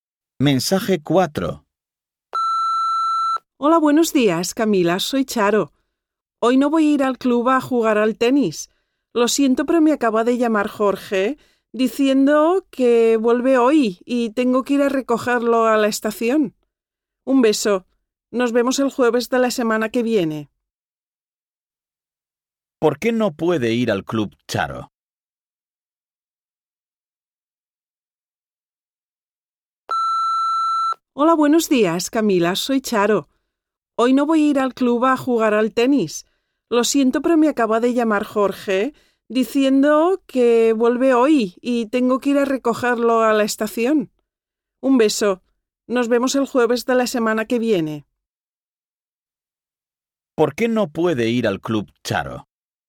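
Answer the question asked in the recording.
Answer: Porque tiene que recoger a Jorge en la estación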